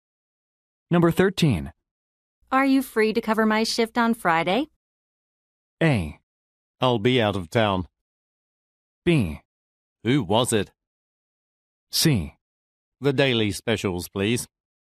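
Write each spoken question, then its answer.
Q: Are you free to cover my shift on Friday?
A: A: I'll be out of town.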